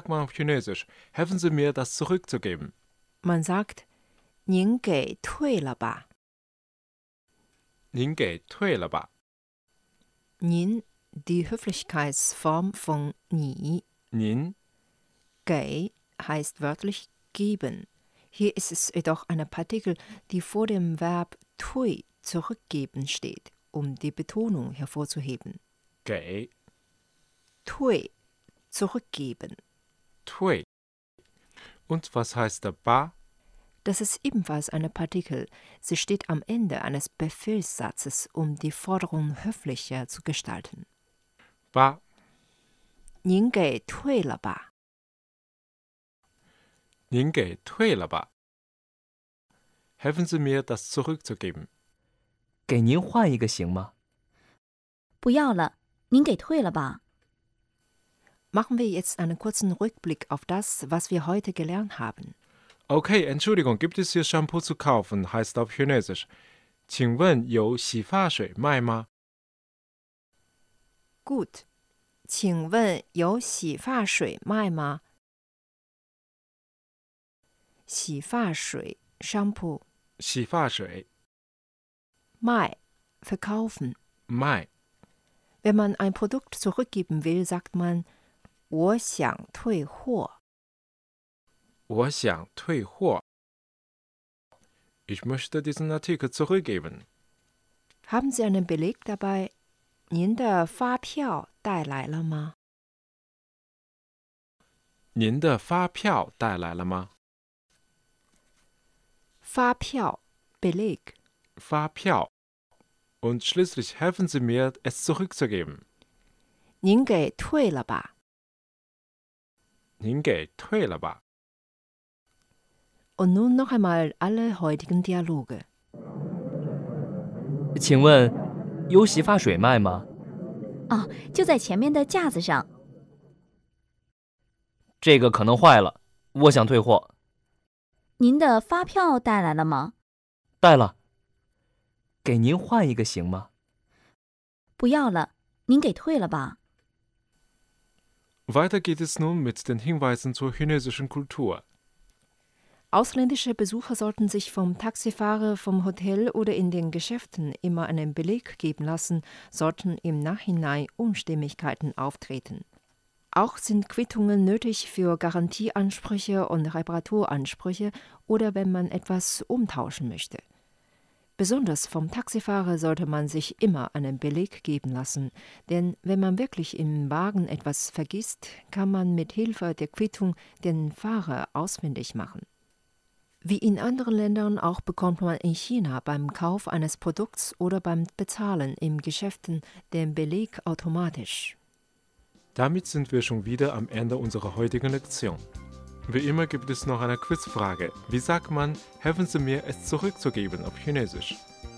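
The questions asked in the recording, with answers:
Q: Wie sagt man, helfen Sie mir, es zurückzugeben auf Chinesisch?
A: 您给退了吧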